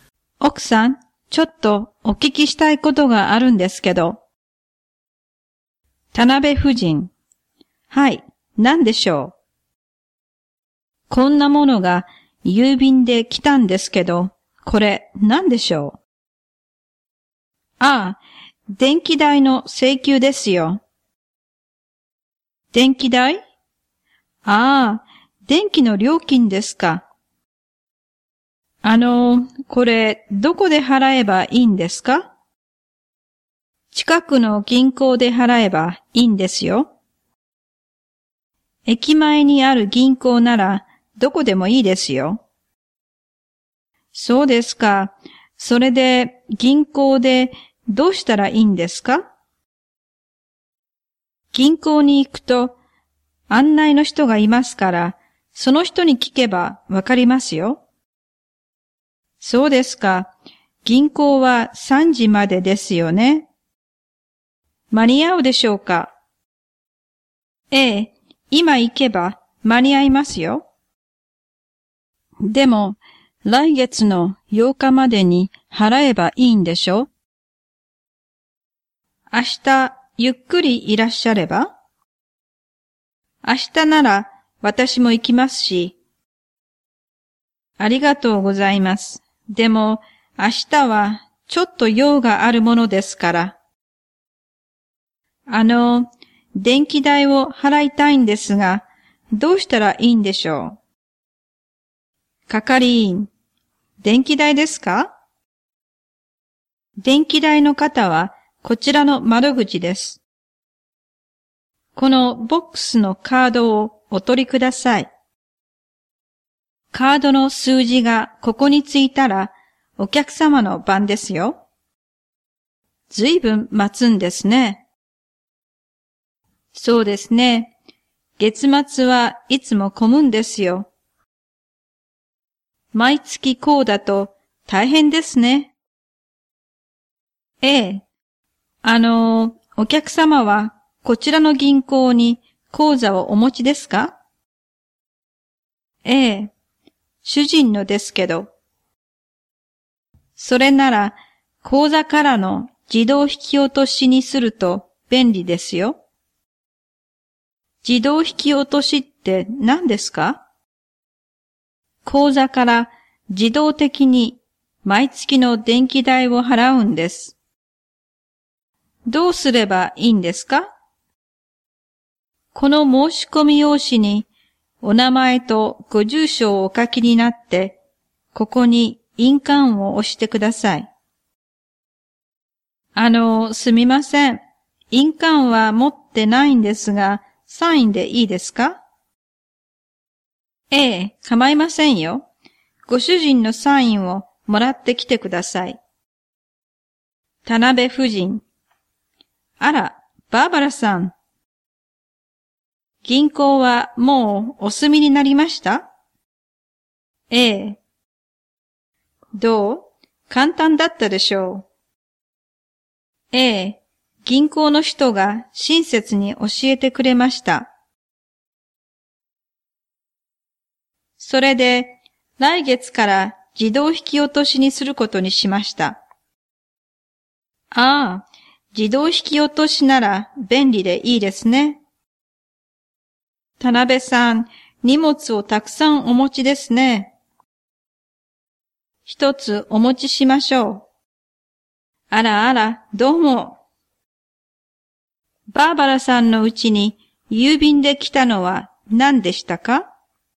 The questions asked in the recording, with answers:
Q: バーバラさんのうちに郵便で来たのは何でしたか?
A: 電気代の請求です。